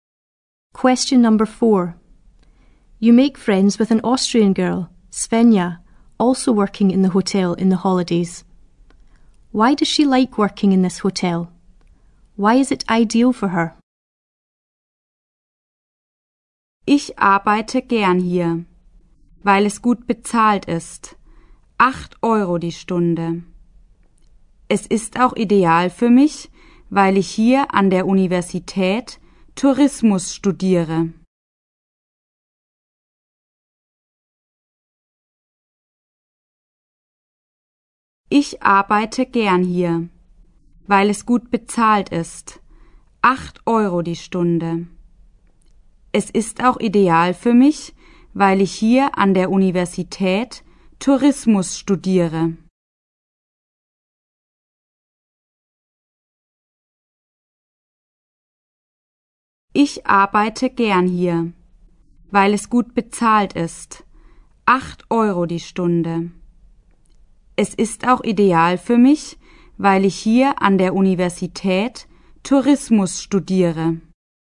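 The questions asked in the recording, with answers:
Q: Why does she like working in this hotel?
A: It is well paid (8 euros an hour)

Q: Why is it ideal for her?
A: She studies tourism at the university here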